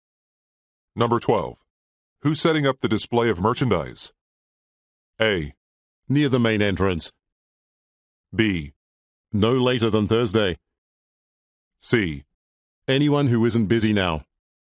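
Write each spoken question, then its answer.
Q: Who's setting up the display of merchandise?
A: C: Anyone who isn't busy now.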